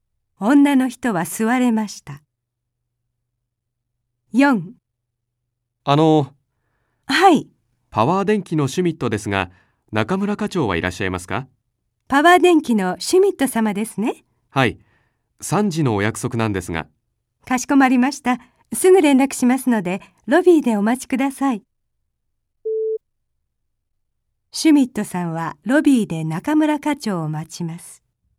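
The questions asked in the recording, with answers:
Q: シュミットさんはロビーで中村課長を待ちます。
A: はい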